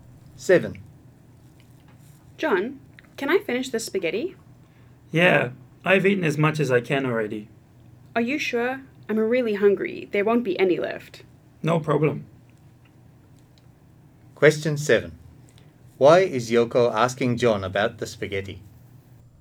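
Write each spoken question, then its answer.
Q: Why is Yoko asking John about the spaghetti?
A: She is really hungry and wants to finish it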